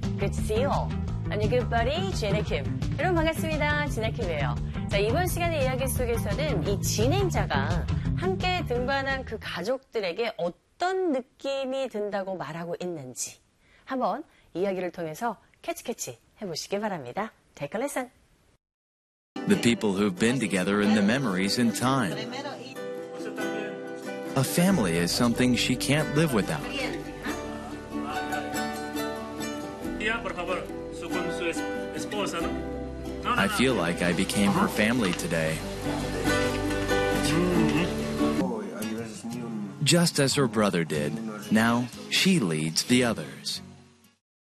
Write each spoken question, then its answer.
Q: 이 진행자가 함께 등반한 그 가족들에게 어떤 느낌이 든다고 말하고 있는지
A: 진행자가 오늘 그 가족의 한 사람이 된 것 같은 느낌이 든 모양입니다.